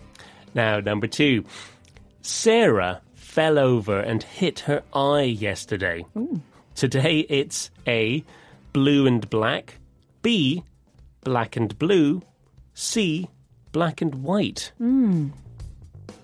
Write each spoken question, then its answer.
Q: Sarah fell over and hit her eye yesterday.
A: And the answer is B, black and blue.